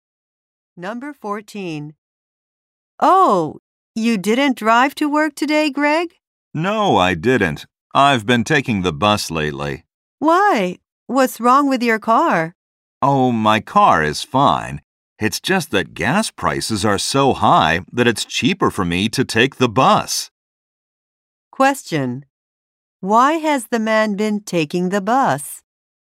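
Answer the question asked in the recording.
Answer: Gas prices are high, so the bus is cheaper.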